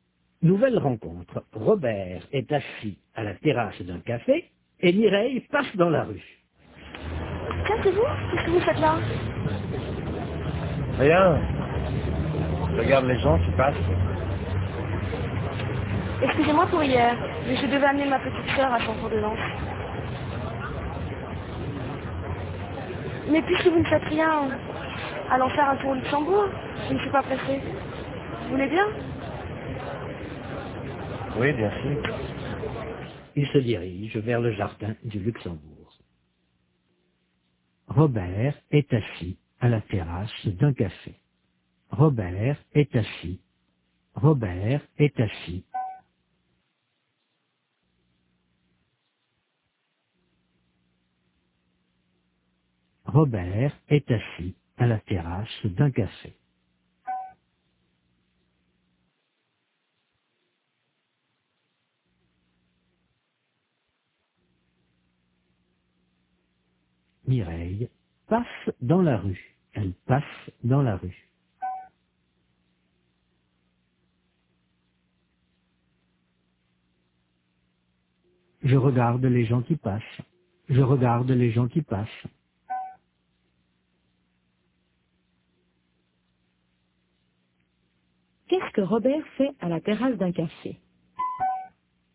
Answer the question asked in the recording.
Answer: Il regarde les gens qui passent.